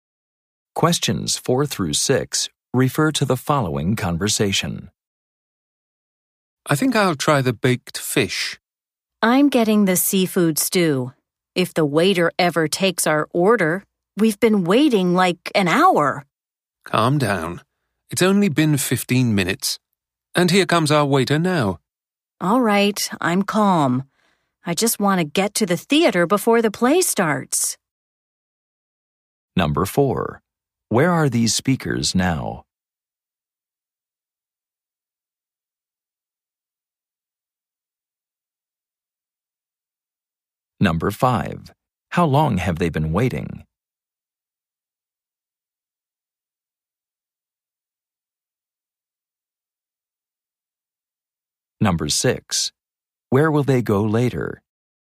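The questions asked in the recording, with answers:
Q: Where are these speakers now?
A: In a restaurant

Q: How long have they been waiting?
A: 15 minutes

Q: Where will they go later?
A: To the theater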